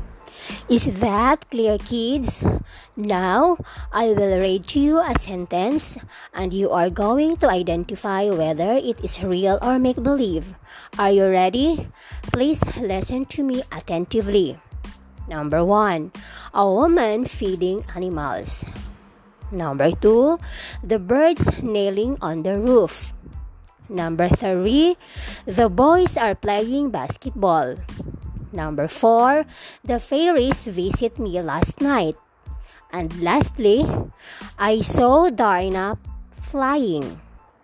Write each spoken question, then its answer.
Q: A woman feeding animals.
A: If your answer number 1 is real, that is correct.

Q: The birds nailing on the roof.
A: If your answer in number 2 is make-believe, again, that is correct.

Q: The boys are playing basketball.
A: If your answer in number 3 is real, again, that's correct.

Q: The fairies visit me last night.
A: If your answer in number 4 is make-believe, that is also correct.

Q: I saw Dina flying.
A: And if your answer in number 5 is make-believe, very good.